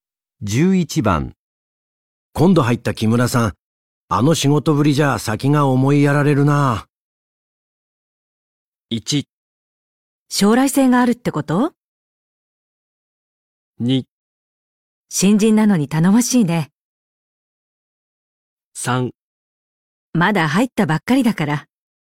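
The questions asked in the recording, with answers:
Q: 今度入った木村さん、あの仕事ぶりじゃ先が思いやられるな。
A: 3: まだ入ったばっかりだから。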